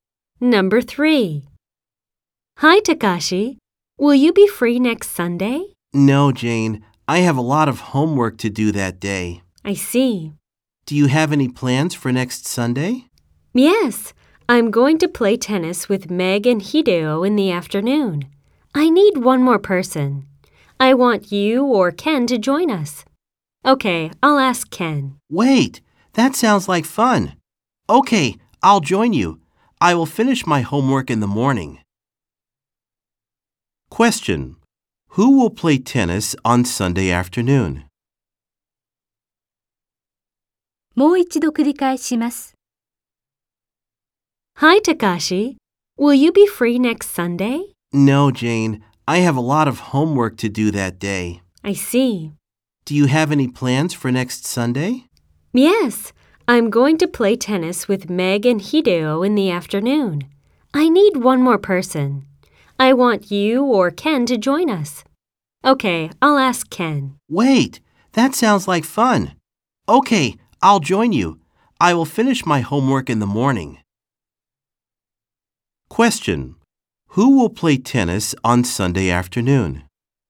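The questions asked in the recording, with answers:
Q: Who will play tennis on Sunday afternoon?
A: Jane, Meg, Hideo and Takashi.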